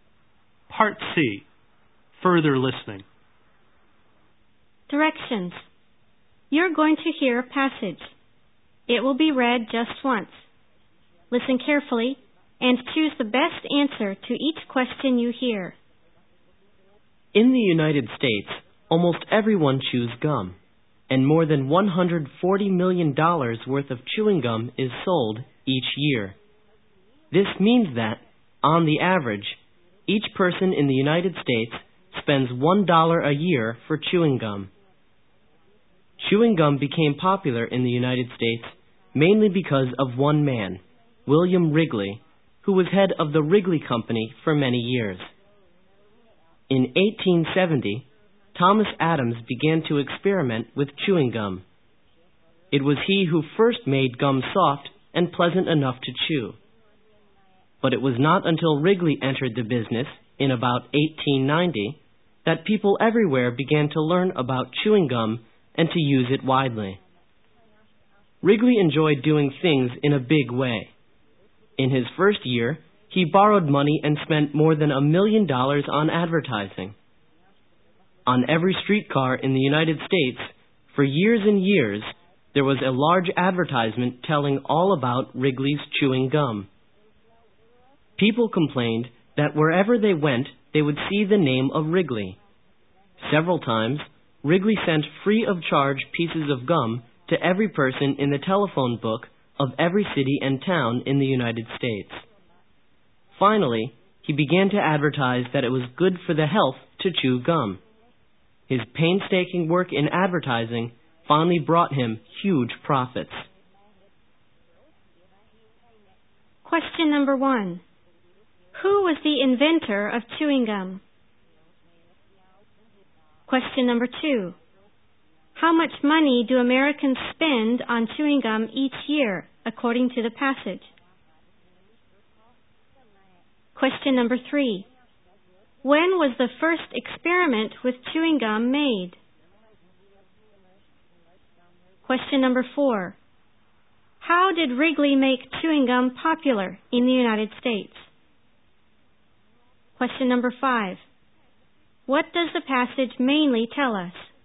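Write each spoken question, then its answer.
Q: Who was the inventor of chewing gum?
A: Thomas Adams

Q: How much money do Americans spend on chewing gum each year, according to the passage?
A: More than $140 million

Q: When was the first experiment with chewing gum made?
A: In 1870

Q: How did Wrigley make chewing gum popular in the United States?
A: Through large-scale advertising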